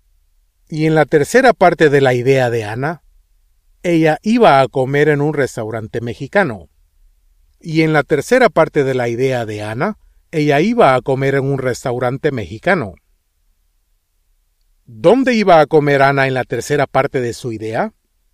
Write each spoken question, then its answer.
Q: ¿Dónde iba a comer Anna en la tercera parte de su idea?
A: En un restaurante mexicano.